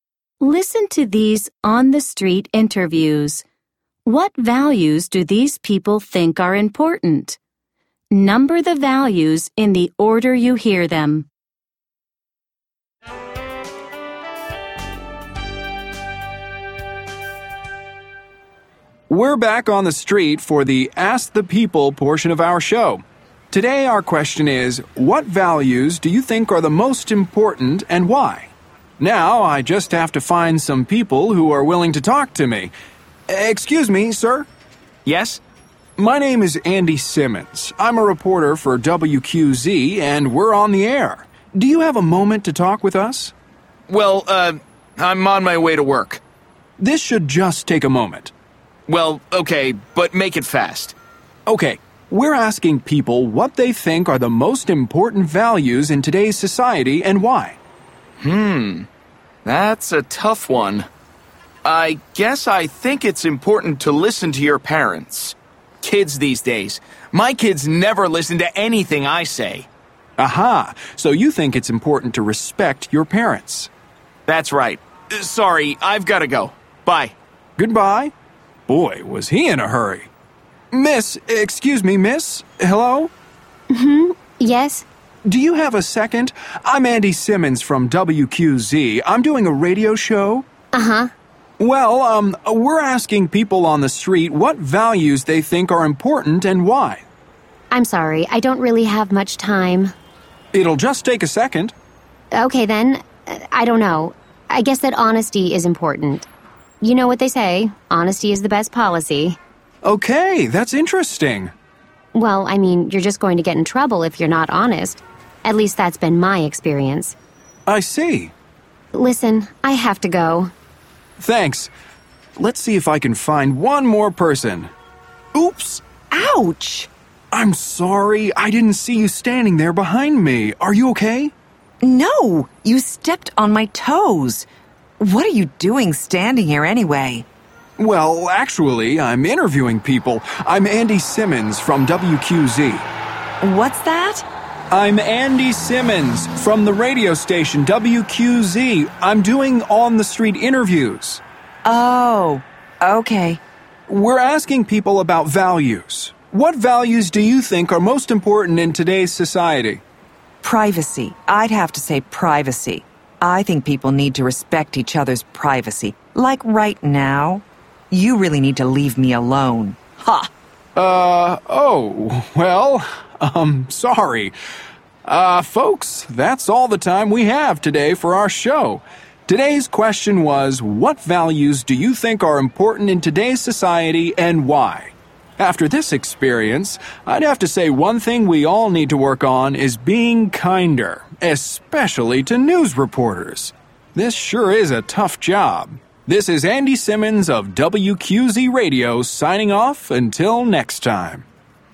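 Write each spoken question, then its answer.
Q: What values do these people think are important?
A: Respecting your parents, honesty, and privacy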